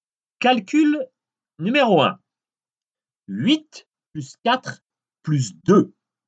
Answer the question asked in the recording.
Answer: Réponse 14.